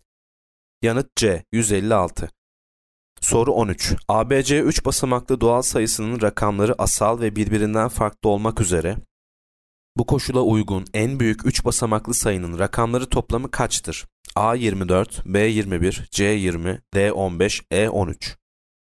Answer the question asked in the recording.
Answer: Yanıt D 15.